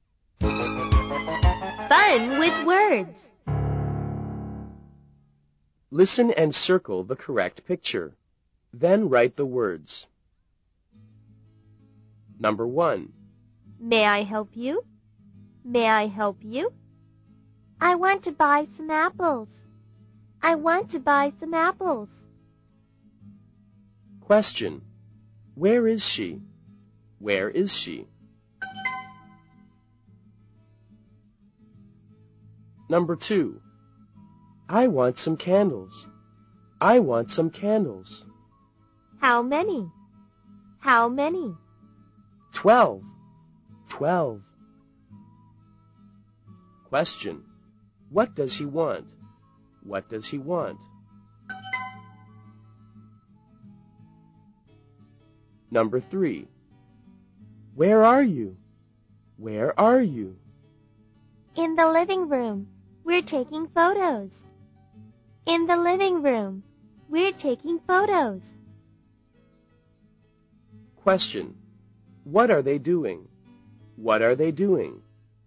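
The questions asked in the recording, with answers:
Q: What does he want?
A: 12 candles

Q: What are they doing?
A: They're taking photos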